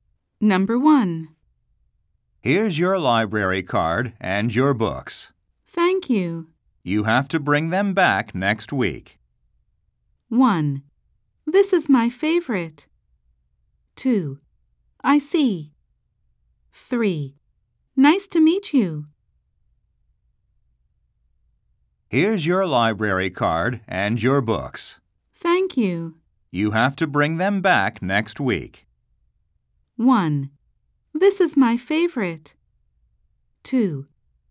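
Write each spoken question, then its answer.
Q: You have to bring them back next week.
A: 2: I see.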